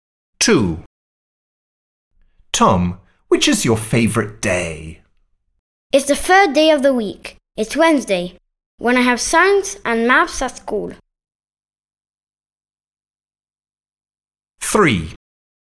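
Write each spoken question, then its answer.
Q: Tom, which is your favourite day?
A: Wednesday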